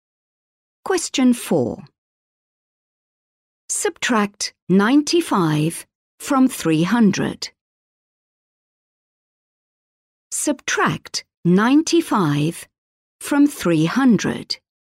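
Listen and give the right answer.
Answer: 205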